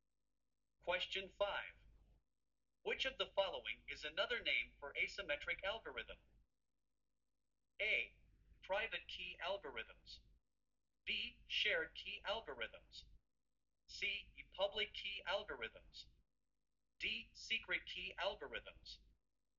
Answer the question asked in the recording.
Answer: The correct answer is C.